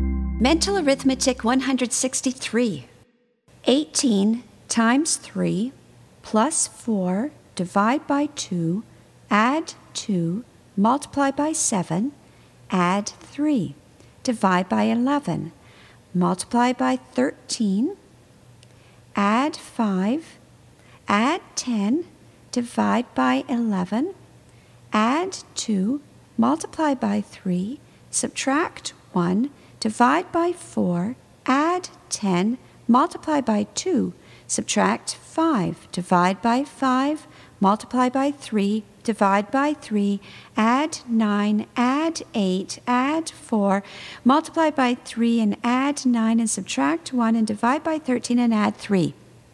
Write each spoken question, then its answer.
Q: 18 times 3 plus 4 divide by 2, add 2, multiply by 7, add 3, divide by 11, multiply by 13, add 5, add 10, divide by 11, add 2, multiply by 3, subtract 1, divide by 4, add 10, multiply by 2, subtract 5, divide by 5, multiply by 3, divide by 3, add 9, add 8, add 4, multiply by 3 and add 9 and subtract 1 and divide by 13 and add 3.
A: And the answer is 11.